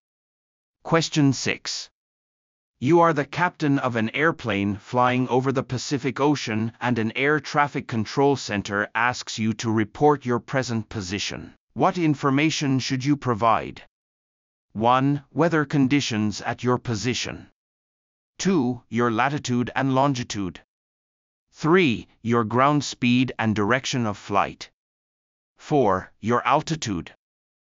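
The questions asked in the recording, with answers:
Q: What information should you provide?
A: 2: Your latitude and longitude.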